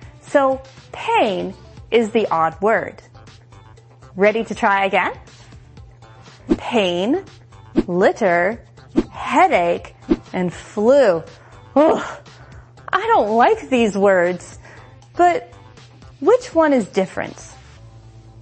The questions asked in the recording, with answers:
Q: Ugh, I don't like these words, but which one is different?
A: The answer is litter.